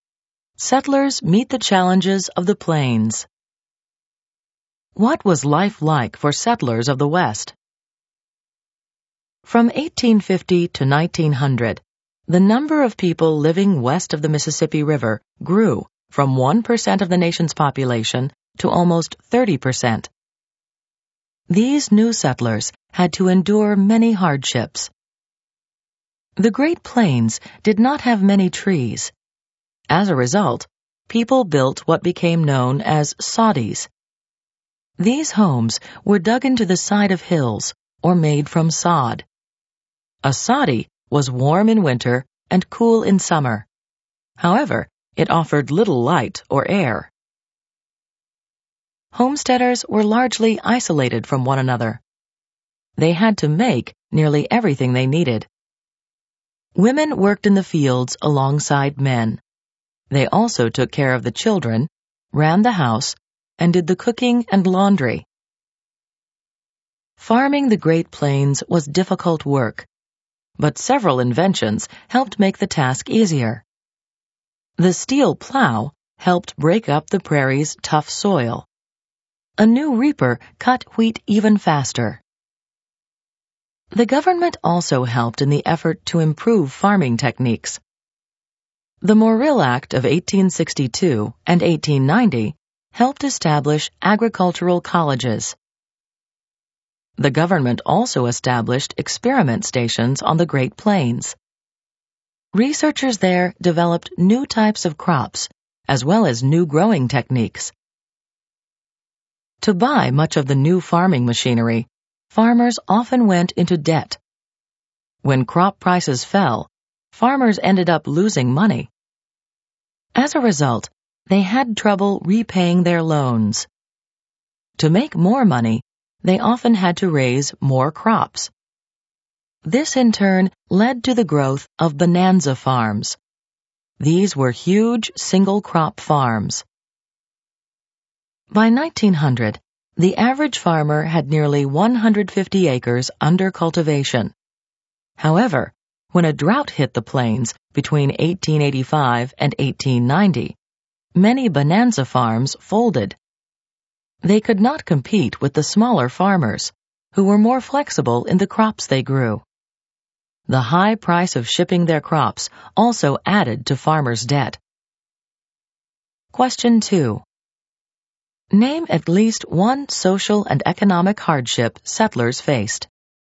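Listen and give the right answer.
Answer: Isolation from others; debt from buying farm machinery and high shipping costs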